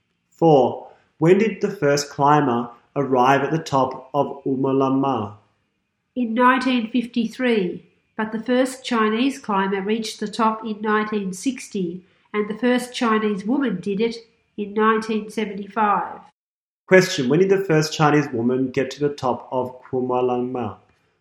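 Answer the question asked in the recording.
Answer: In 1975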